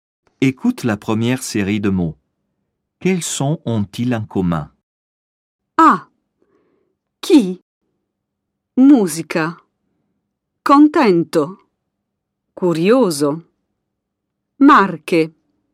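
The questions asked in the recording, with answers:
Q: Quels sons ont-ils en commun?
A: le son [k]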